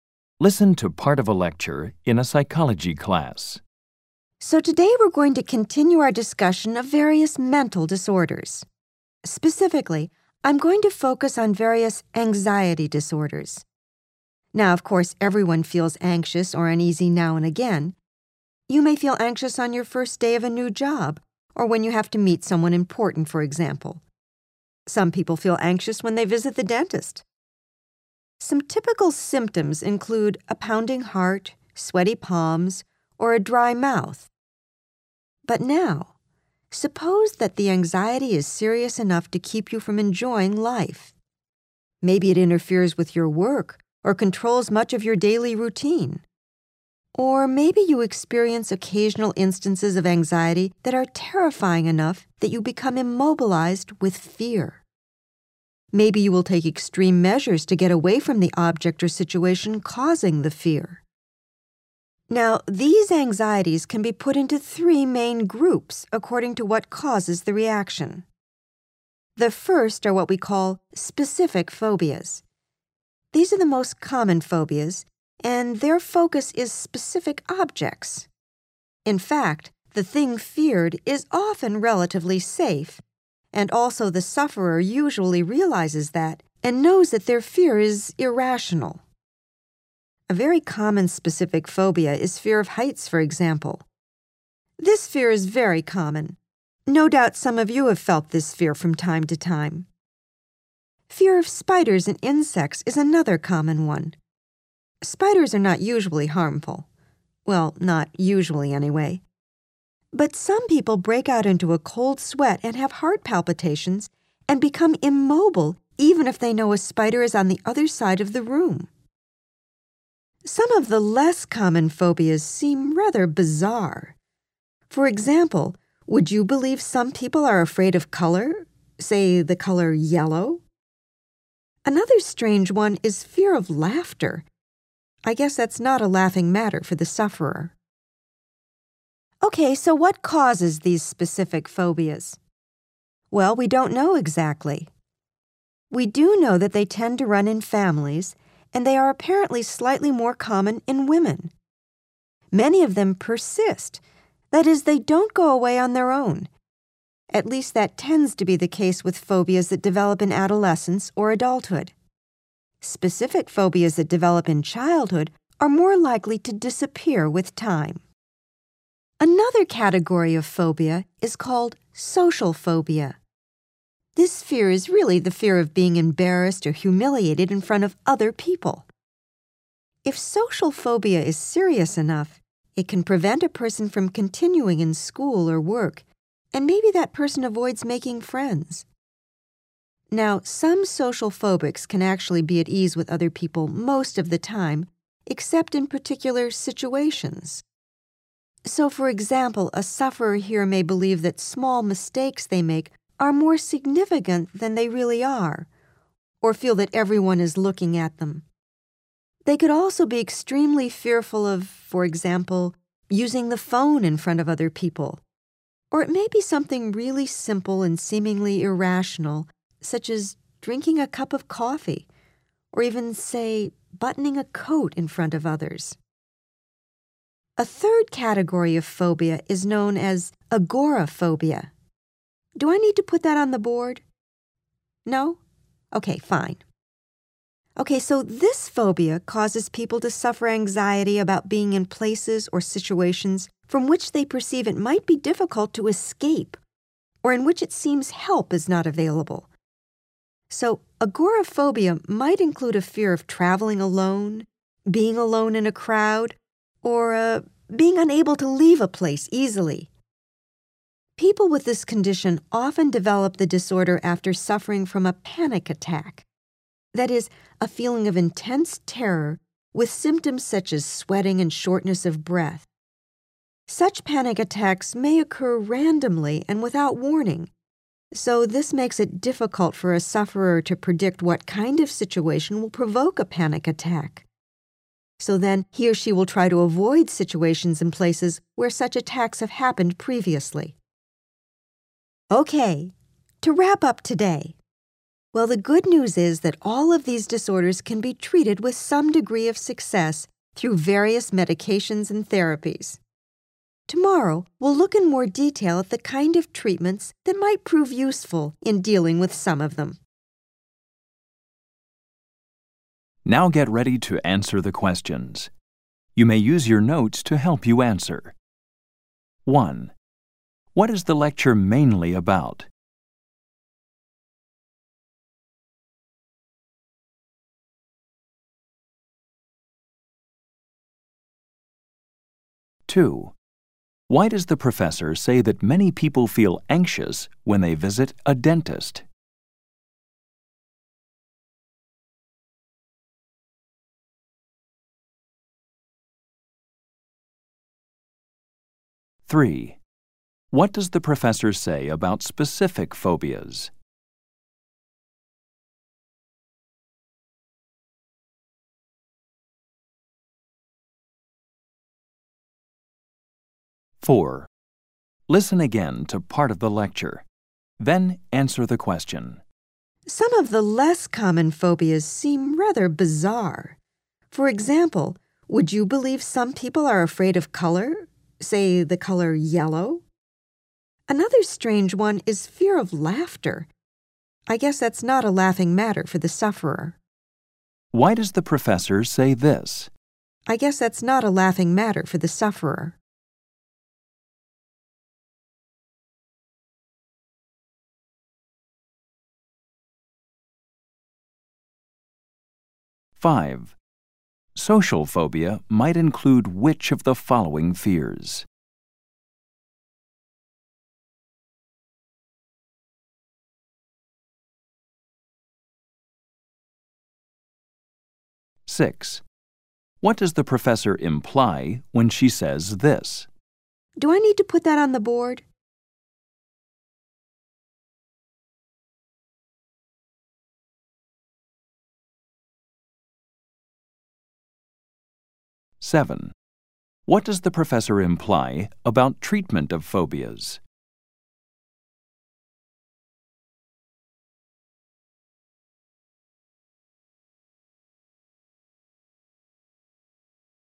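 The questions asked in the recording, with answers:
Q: What is the lecture mainly about?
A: Different types of anxiety disorders (phobias)

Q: Why does the professor say that many people feel anxious when they visit a dentist?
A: To give an example of normal, everyday anxiety

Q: What does the professor imply about treatment of phobias?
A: They can be treated with some success through medications and therapies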